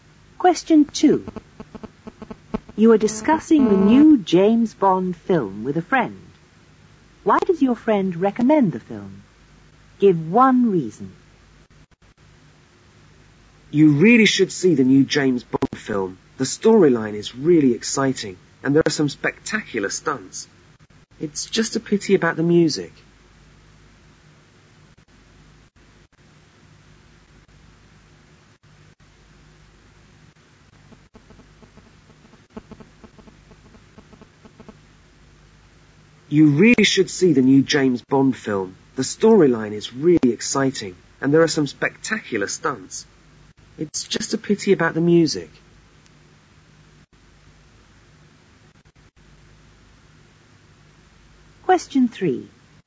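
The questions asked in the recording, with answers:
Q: Why does your friend recommend the film? Give one reason.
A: The storyline is exciting / there are spectacular stunts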